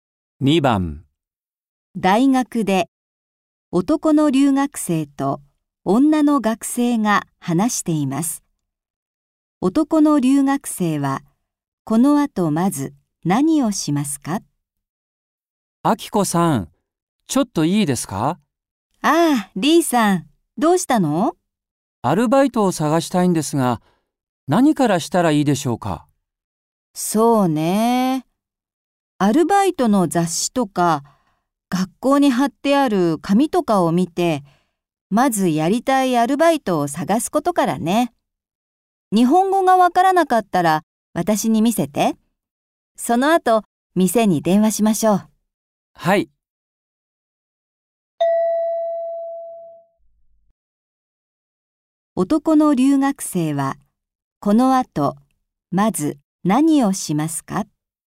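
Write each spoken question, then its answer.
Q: 男の留学生は、この後、まず何をしますか?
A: アルバイトの雑誌や学校に貼ってある紙を見て、やりたいアルバイトを探す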